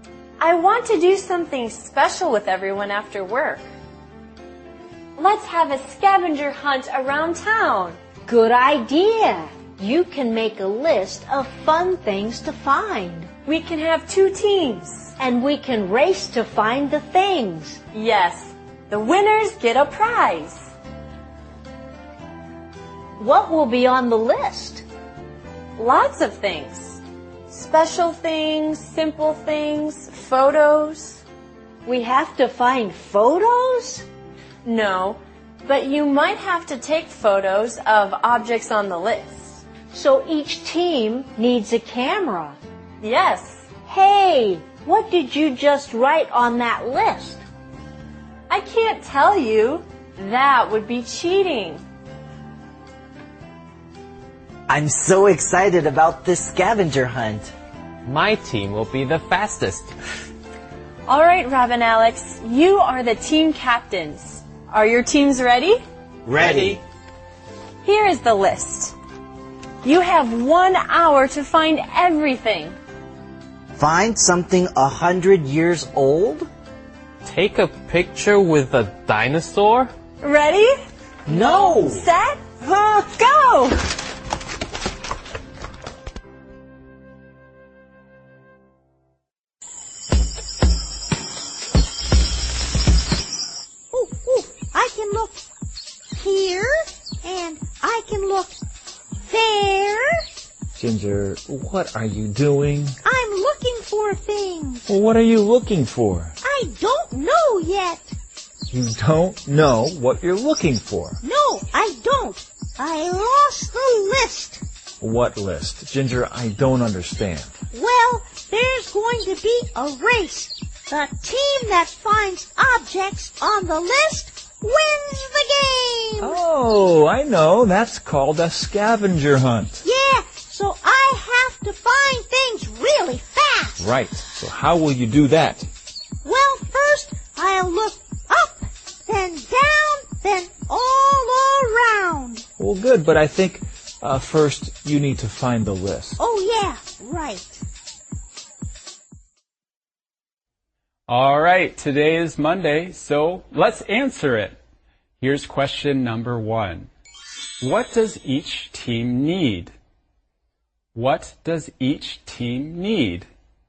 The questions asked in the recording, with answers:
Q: What does each team need?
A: Each team needs a camera.